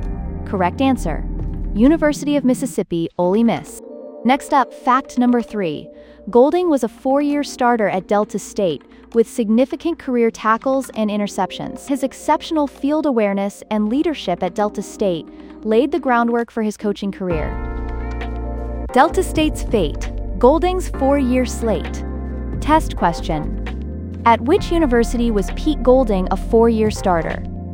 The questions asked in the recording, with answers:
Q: At which university was Pete Golding a 4-year starter?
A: Correct answer, Delta State.